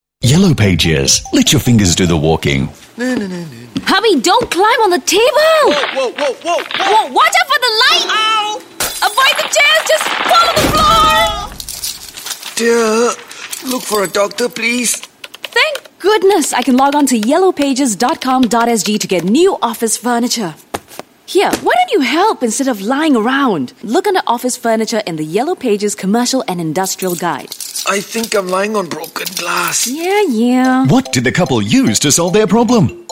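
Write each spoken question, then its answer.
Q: What did the couple use to solve their problem?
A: The Yellow Pages (yellowpages.com.sg / Commercial and Industrial Guide)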